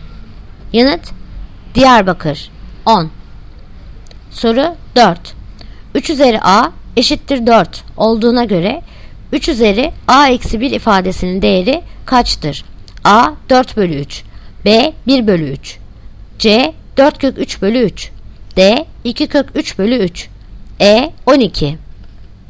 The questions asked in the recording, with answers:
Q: 3 üzeri A eşittir 4 olduğuna göre 3 üzeri A eksi 1 ifadesinin değeri kaçtır?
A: Yanıt Adana 4/3.